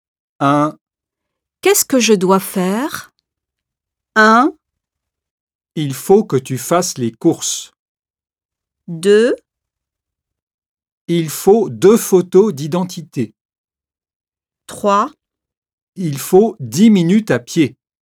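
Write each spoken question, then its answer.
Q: Qu'est-ce que je dois faire?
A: 1: Il faut que tu fasses les courses.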